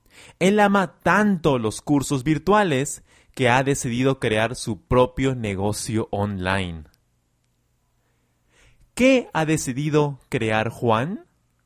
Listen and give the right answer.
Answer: Juan ha decidido crear su propio negocio online.